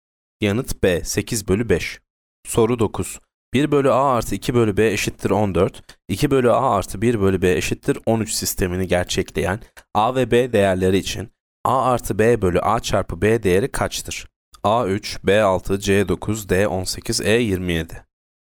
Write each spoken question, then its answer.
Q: 1 bölü a artı 2 bölü b eşittir 14, 2 bölü a artı 1 bölü b eşittir 13 sistemini gerçekleyen a ve b değerleri için a artı b bölü a çarpı b değeri kaçtır?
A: Yanıt c 9.